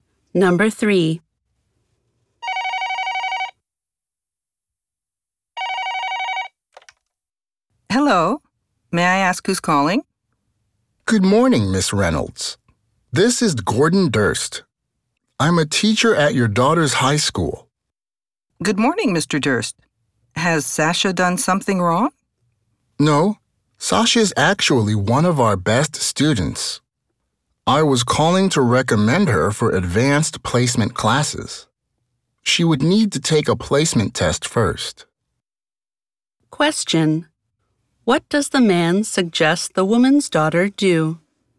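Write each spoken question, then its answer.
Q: What does the man suggest the woman's daughter do?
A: Take advanced placement classes (after a placement test)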